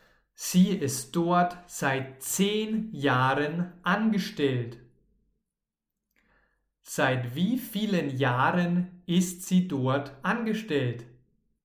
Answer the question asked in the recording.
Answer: Seit 10 Jahren, genau. Sie ist dort seit 10 Jahren angestellt.